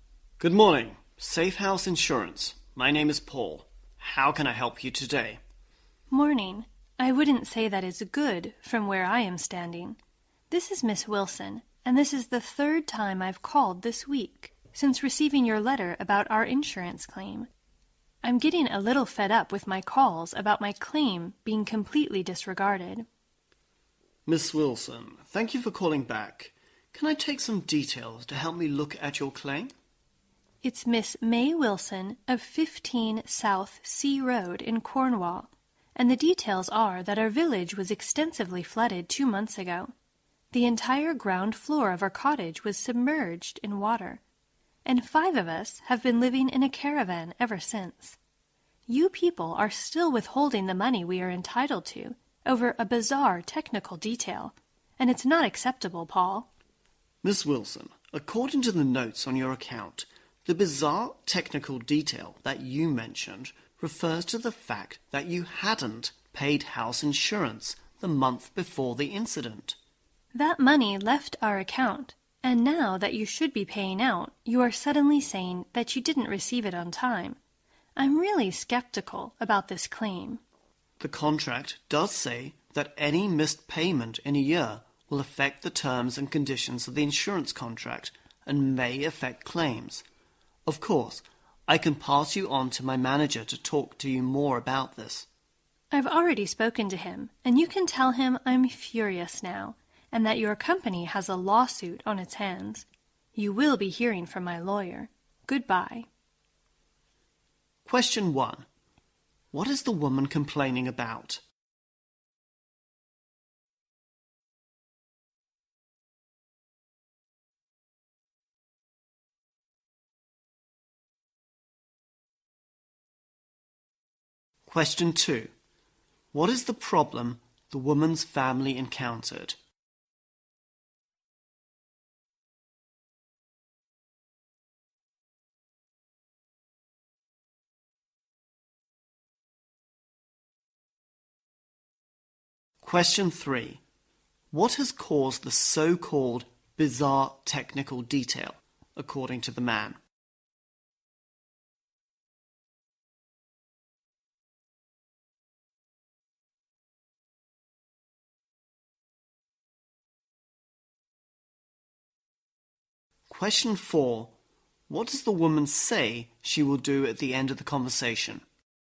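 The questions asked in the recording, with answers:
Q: What is the woman complaining about?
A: Her calls about her insurance claim being disregarded and the money being withheld

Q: What is the problem the woman's family encountered?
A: Their village was flooded and their cottage's ground floor was submerged, so they live in a caravan

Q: What has caused the so-called bizarre technical detail, according to the man?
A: She hadn't paid the house insurance the month before the incident

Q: What does the woman say she will do at the end of the conversation?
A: Take legal action through her lawyer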